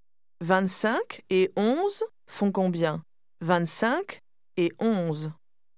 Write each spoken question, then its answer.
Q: 25 et 11 font combien ? 25 et 11.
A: 36.